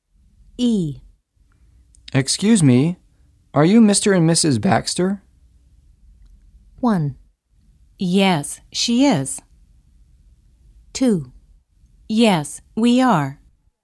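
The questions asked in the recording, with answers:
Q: Excuse me, are you Mr. and Mrs. Baxter?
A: 2: Yes, we are.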